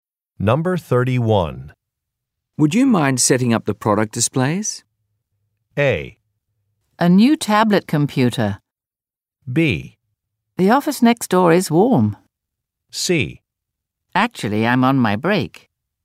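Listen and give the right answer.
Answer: C: Actually, I'm on my break.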